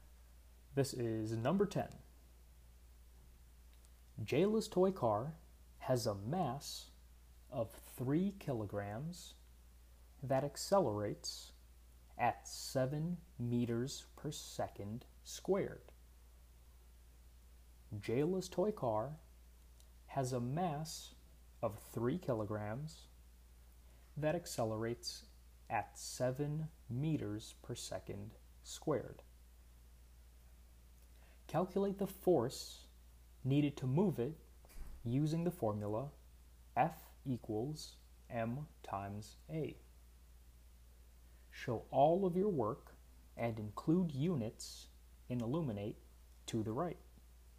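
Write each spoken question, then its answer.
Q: Calculate the force needed to move it using the formula F equals m times a.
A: 21 newtons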